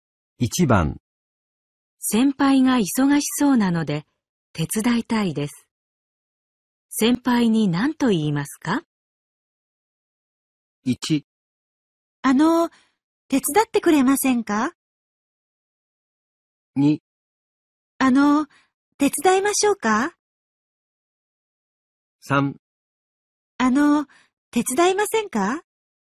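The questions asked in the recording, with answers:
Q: 先輩が忙しそうなので手伝いたいです。先輩に何と言いますか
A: 2: あの、手伝いましょうか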